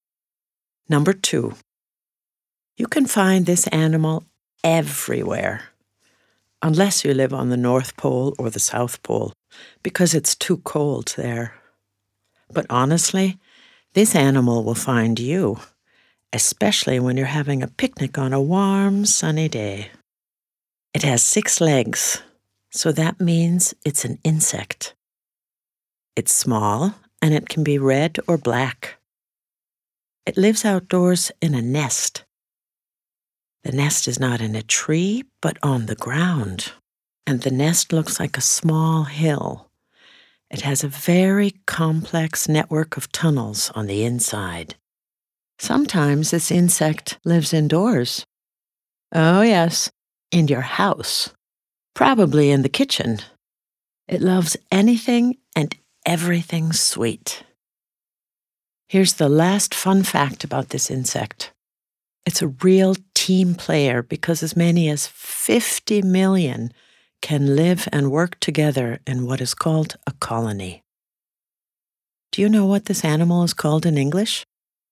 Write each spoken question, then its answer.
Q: Do you know what this animal is called in English?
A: A-N-T.